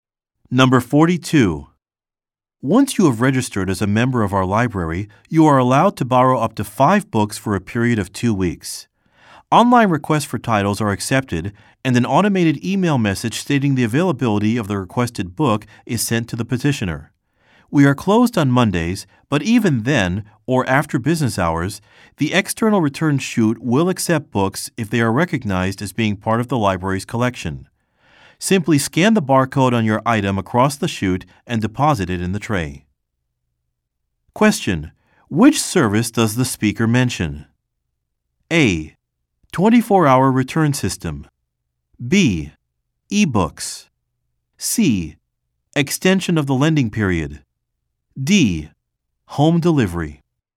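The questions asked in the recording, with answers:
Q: Which service does the speaker mention?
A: A: 24-hour return system.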